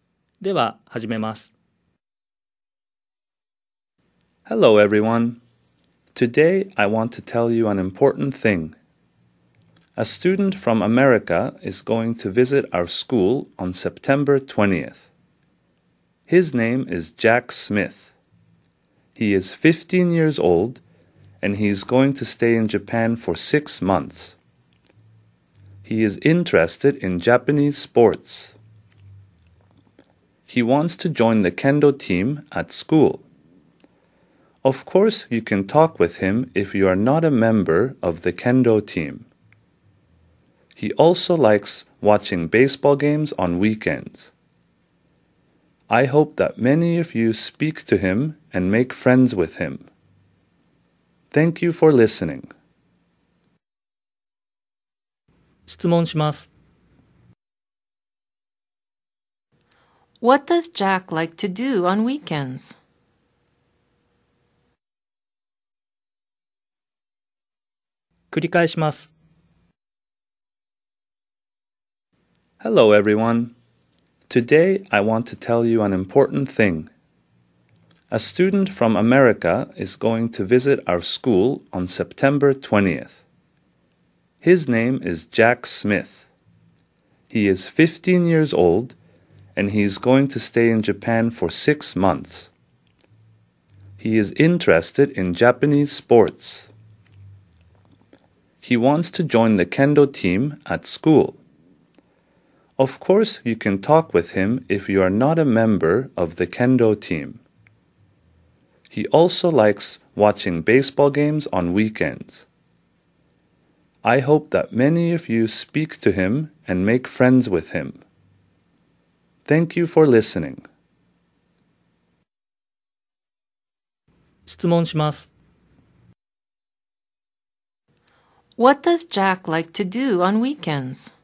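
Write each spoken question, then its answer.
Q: What does Jack like to do on weekends?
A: He likes watching baseball games.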